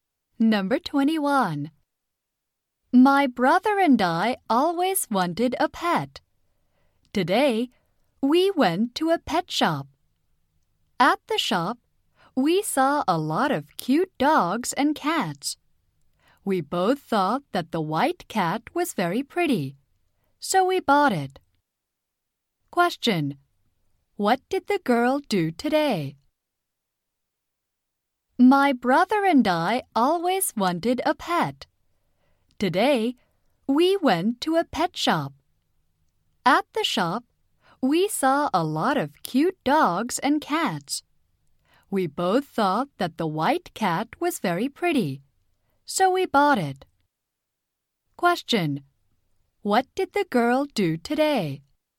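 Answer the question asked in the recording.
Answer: She bought a white cat at a pet shop.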